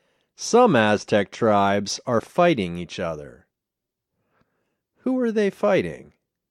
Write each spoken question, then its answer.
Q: Who are they fighting?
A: They're fighting each other.